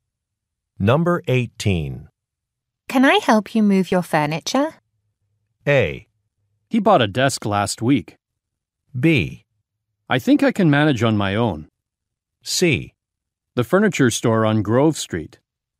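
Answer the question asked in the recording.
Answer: B: I think I can manage on my own.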